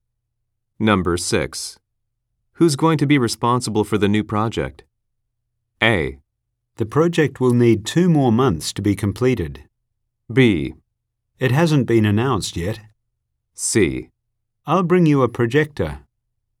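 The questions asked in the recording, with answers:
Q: Who's going to be responsible for the new project?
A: B: It hasn't been announced yet.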